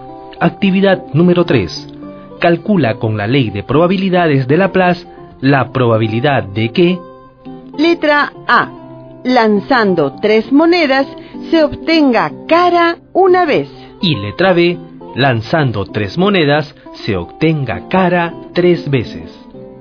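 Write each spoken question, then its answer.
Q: Lanzando 3 monedas se obtenga cara una vez.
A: 3/8 (37,5%)

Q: Lanzando 3 monedas se obtenga cara 3 veces.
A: 1/8 (12,5%)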